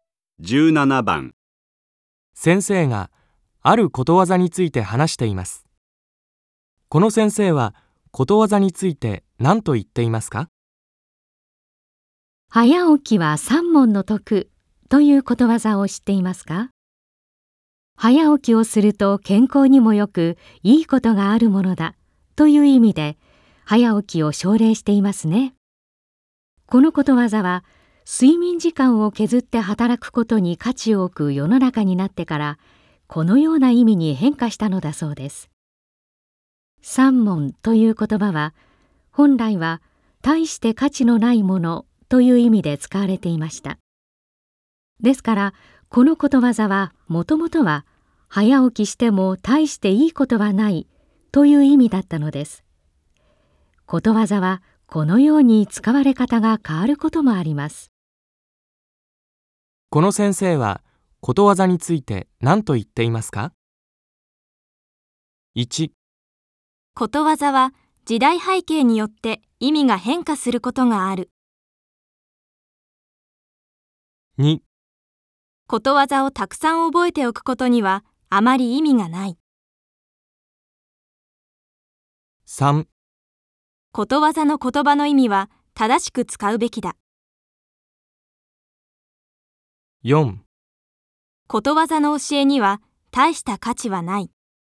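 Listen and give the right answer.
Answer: 1: ことわざは時代背景によって意味が変化することがある。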